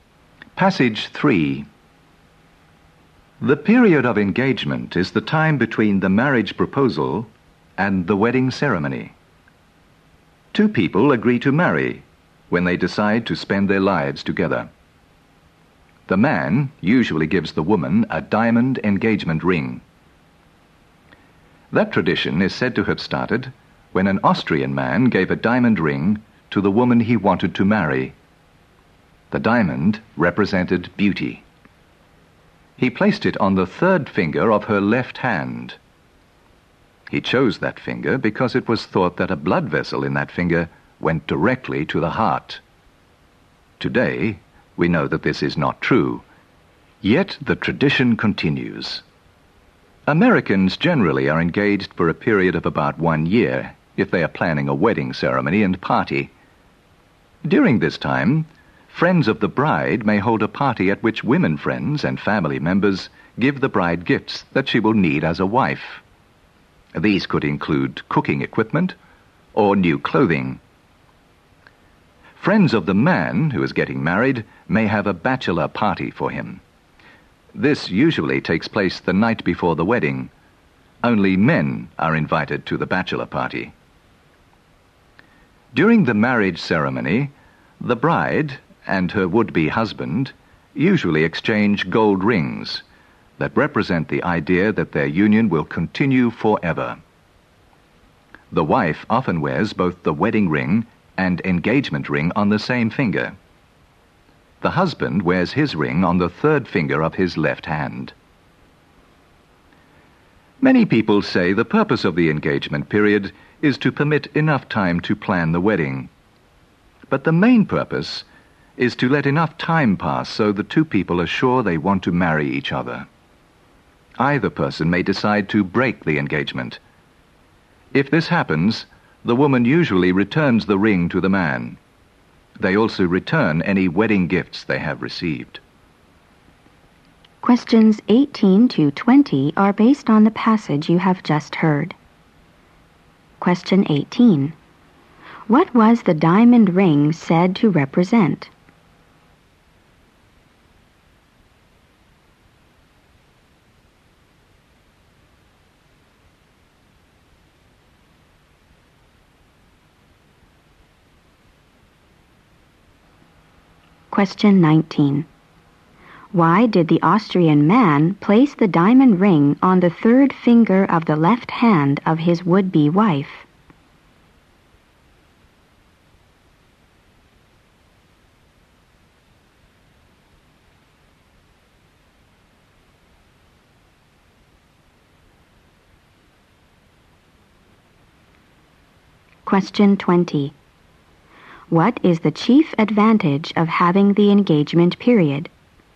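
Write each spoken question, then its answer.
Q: What was the diamond ring said to represent?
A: Beauty

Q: Why did the Austrian man place the diamond ring on the third finger of the left hand of his would-be wife?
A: It was thought a blood vessel in that finger went directly to the heart

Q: What is the chief advantage of having the engagement period?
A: It lets enough time pass so the two people are sure they want to marry each other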